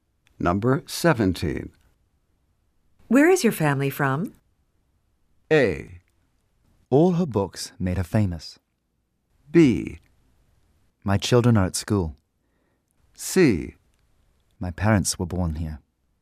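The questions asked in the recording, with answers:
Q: Where is your family from?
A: C: My parents were born here.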